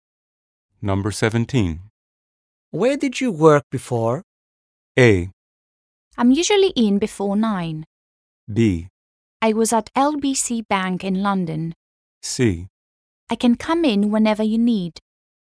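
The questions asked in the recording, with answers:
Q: Where did you work before?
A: B: I was at LBC Bank in London.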